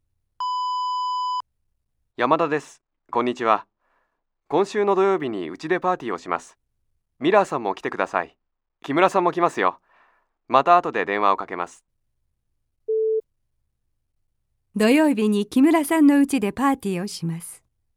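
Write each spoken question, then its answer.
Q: 土曜日に木村さんのうちでパーティーをします。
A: ×(山田さんのうちでパーティーをします)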